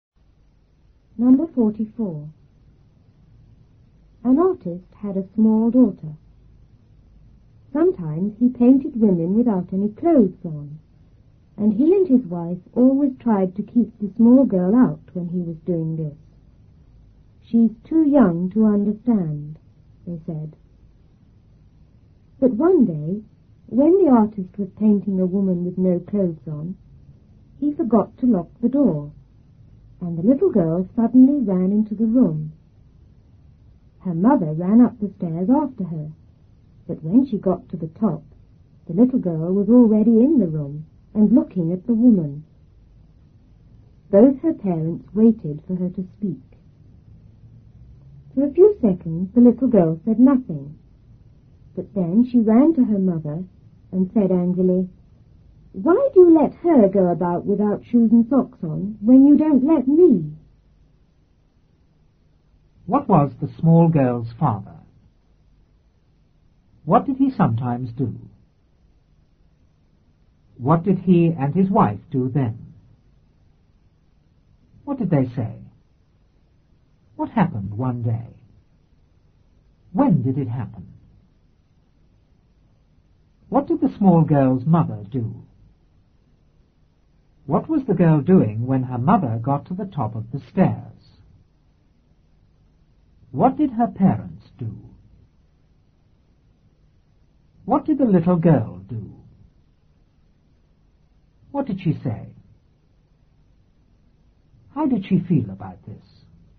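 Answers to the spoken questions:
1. An artist
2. He painted women without any clothes on
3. They tried to keep the small girl out
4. She's too young to understand
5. He forgot to lock the door and the little girl ran into the room
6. When the artist was painting a woman with no clothes on
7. She ran up the stairs after her
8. Looking at the woman in the room
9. They waited for her to speak
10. She said nothing for a few seconds, then ran to her mother
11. Why do you let her go about without shoes and socks on when you don't let me?
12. Angry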